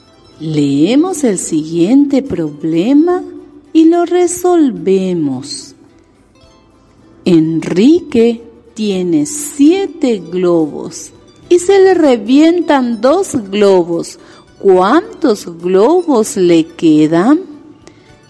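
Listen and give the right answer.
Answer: 5 globos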